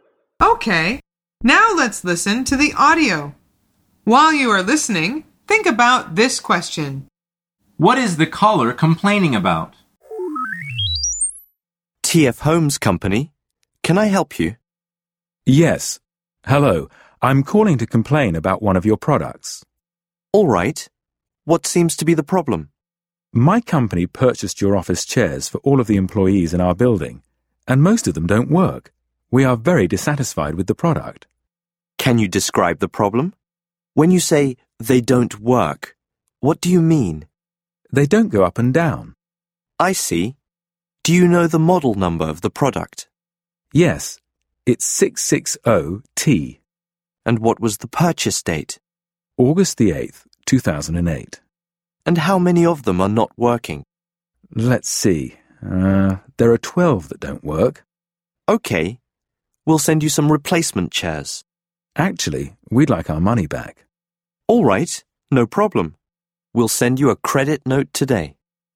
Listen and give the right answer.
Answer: The answer is he is complaining about some office chairs.